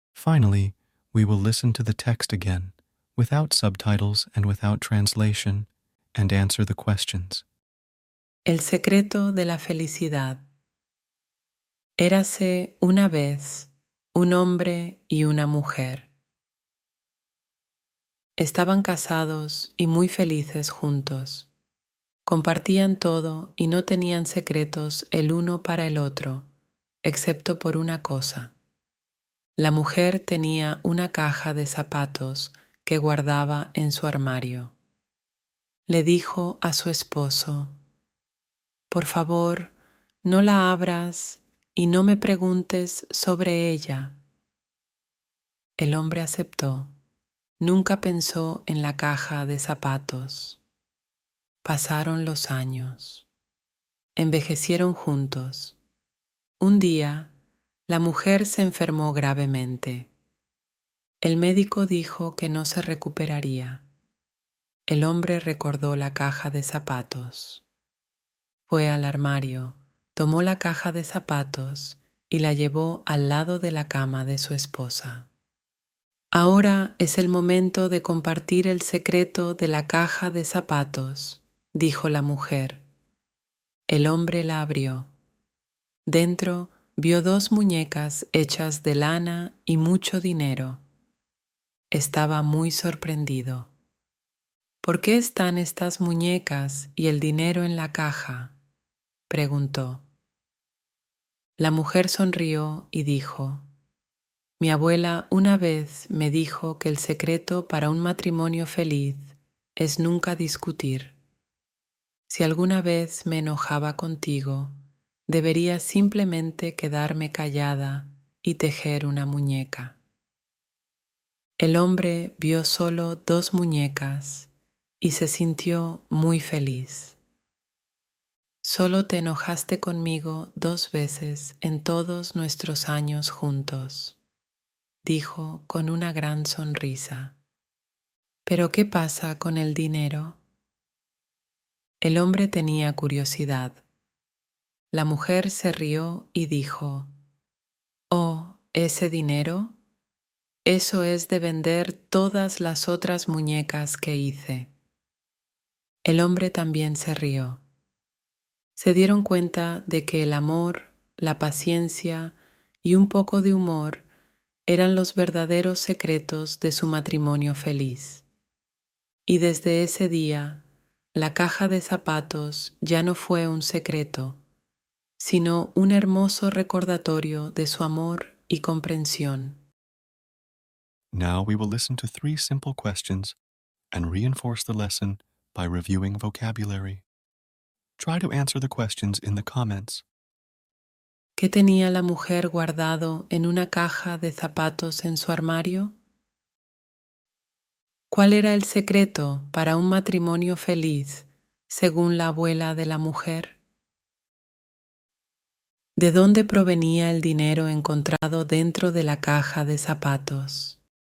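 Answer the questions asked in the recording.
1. Dos muñecas hechas de lana y mucho dinero
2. Nunca discutir
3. De vender todas las otras muñecas que hizo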